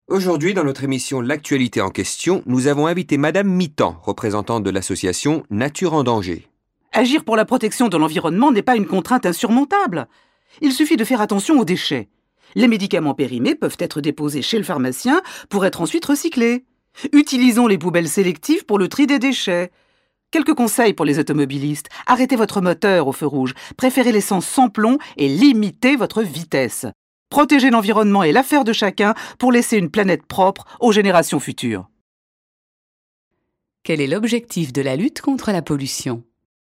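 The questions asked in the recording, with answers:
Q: Quel est l'objectif de la lutte contre la pollution ?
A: Laisser une planète propre aux générations futures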